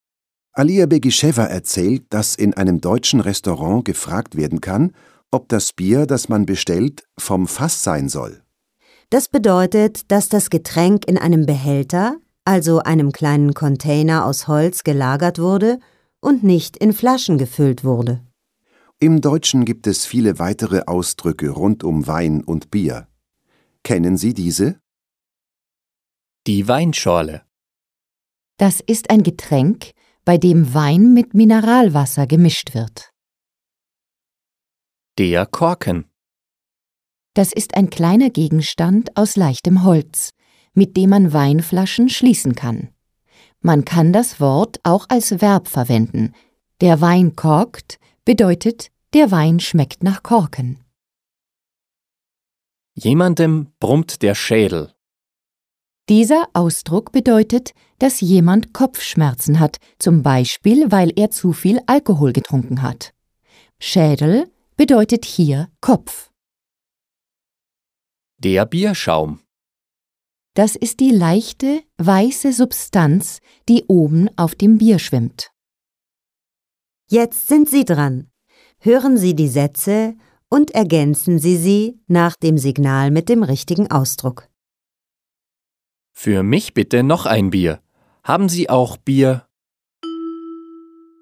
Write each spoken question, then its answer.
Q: Haben Sie auch Bier?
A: Haben Sie auch Bier vom Fass?